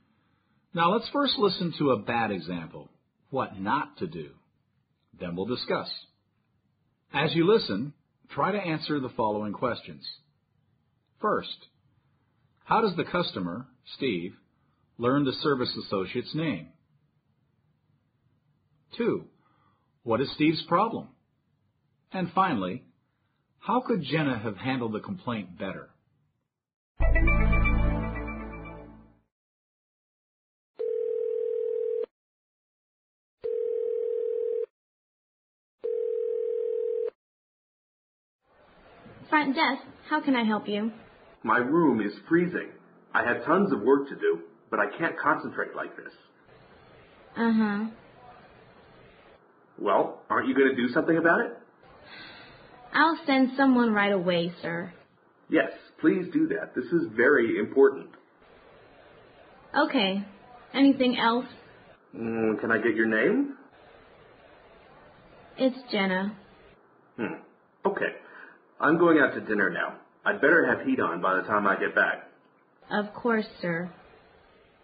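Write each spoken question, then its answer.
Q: First, how does the customer, Steve, learn the service associate's name?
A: He asks her for her name.

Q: what is Steve's problem?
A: His room is freezing, so he can't concentrate on his work.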